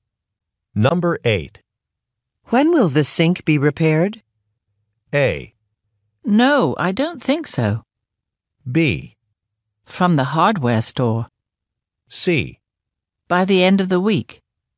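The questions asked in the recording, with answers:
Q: When will the sink be repaired?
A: C: By the end of the week.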